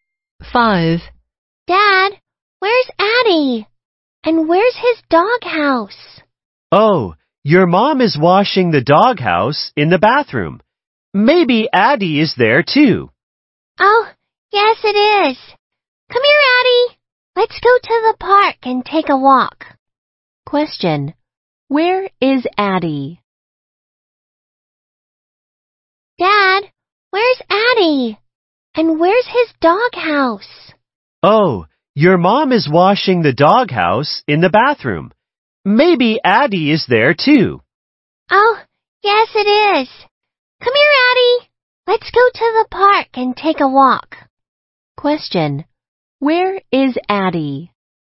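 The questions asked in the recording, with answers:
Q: where is Addie?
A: In the bathroom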